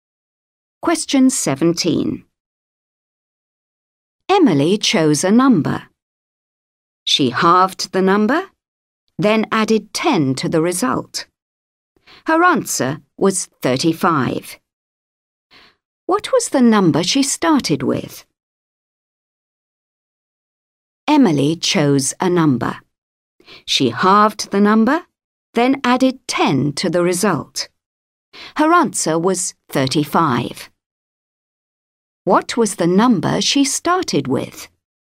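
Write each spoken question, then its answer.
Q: What was the number she started with?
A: 50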